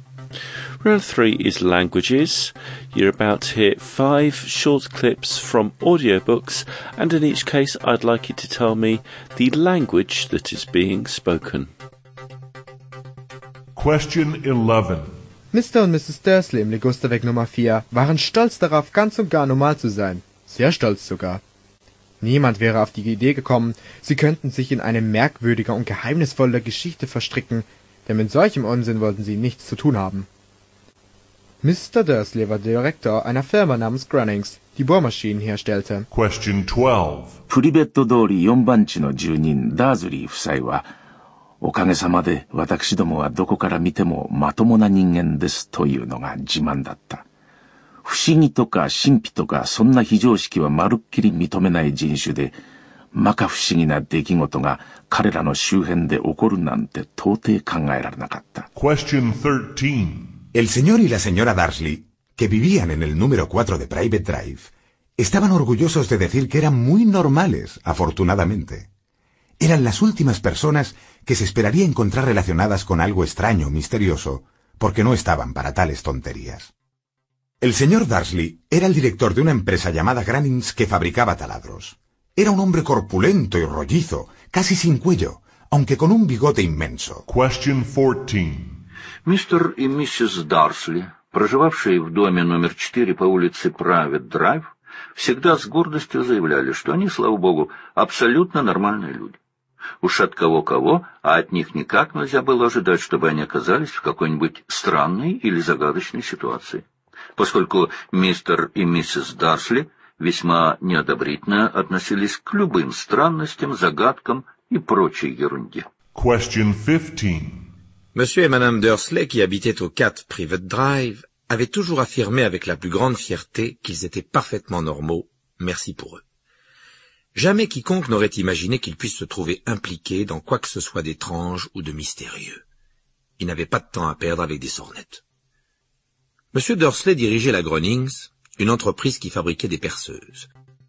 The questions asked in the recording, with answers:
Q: in each case I'd like you to tell me the language that is being spoken.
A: the answer to number 11 was German.

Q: in each case I'd like you to tell me the language that is being spoken.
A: Number 12 was Japanese.

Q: in each case I'd like you to tell me the language that is being spoken.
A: Number 13 was Spanish.

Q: in each case I'd like you to tell me the language that is being spoken.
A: Number 14 was Russian.

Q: in each case I'd like you to tell me the language that is being spoken.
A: And number 15 was French.